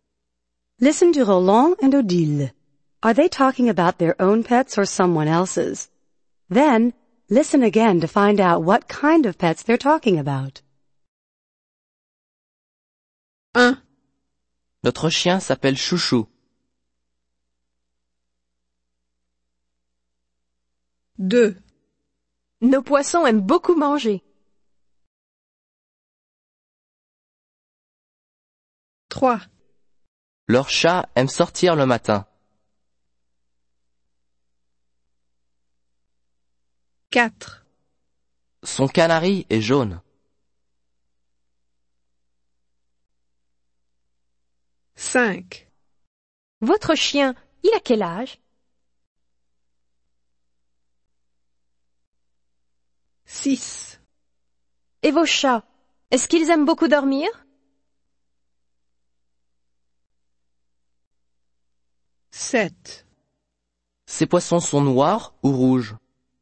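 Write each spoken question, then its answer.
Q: Are they talking about their own pets or someone else's?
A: Their own (a dog)

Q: Are they talking about their own pets or someone else's?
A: Their own (fish)

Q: Are they talking about their own pets or someone else's?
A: Someone else's (a cat)

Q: Are they talking about their own pets or someone else's?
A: Someone else's (a canary)

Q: Are they talking about their own pets or someone else's?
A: Someone else's (a dog)

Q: Are they talking about their own pets or someone else's?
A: Someone else's (cats)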